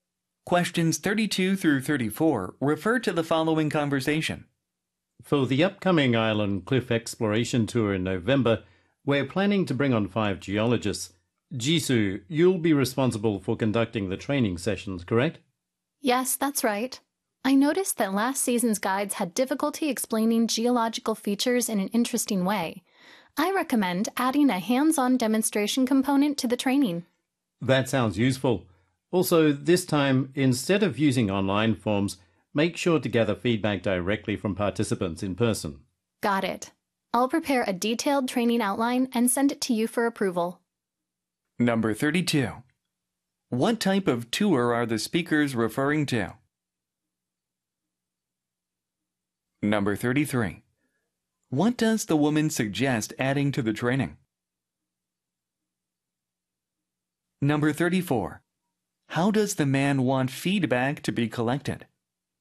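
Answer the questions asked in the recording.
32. An island cliff exploration tour
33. A hands-on demonstration component
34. Directly from participants in person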